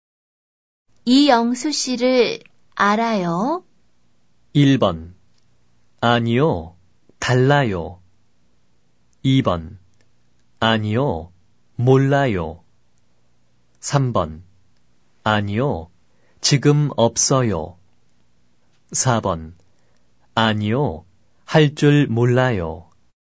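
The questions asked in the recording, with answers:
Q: 이영수 씨를 알아요?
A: 2번: 아니요. 몰라요.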